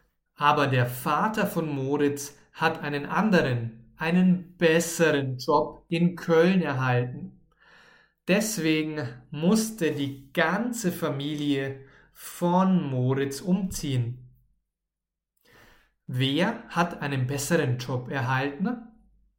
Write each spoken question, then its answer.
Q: Wer hat einen besseren Job erhalten?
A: Der Vater von Moritz. Er hat einen besseren Job erhalten.